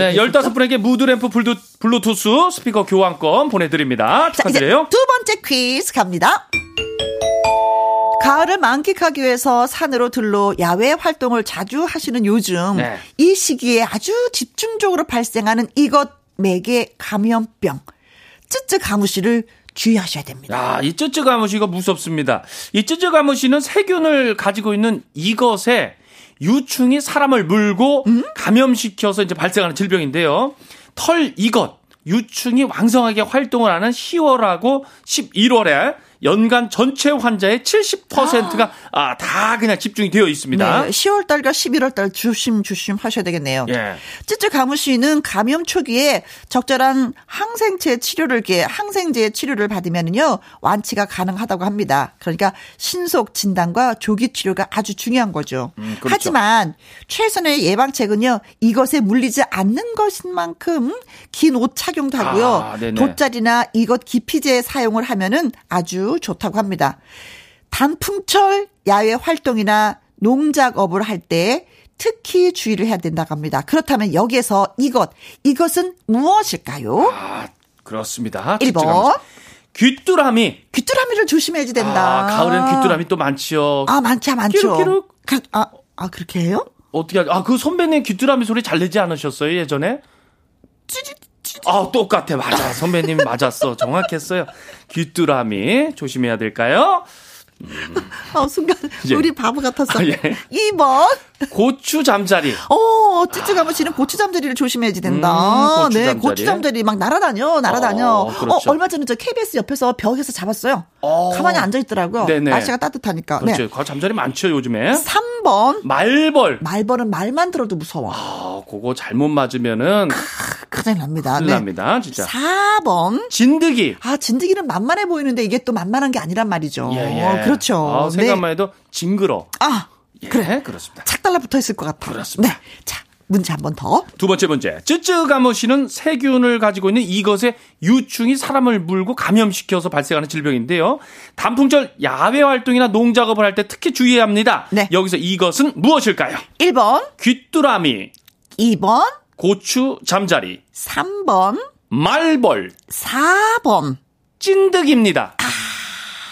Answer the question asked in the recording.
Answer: 어 3번 진드기가 정답입니다.